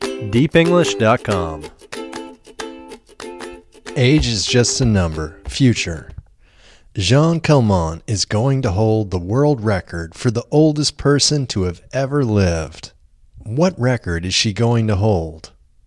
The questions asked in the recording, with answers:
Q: What record is she going to hold?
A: She is going to hold the world record for the oldest person to have ever lived.